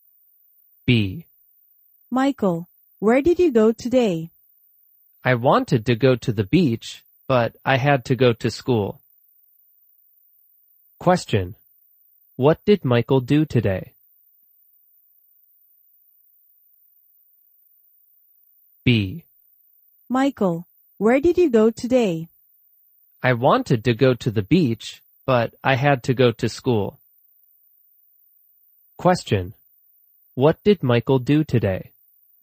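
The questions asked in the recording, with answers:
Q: What did Michael do today?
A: He went to school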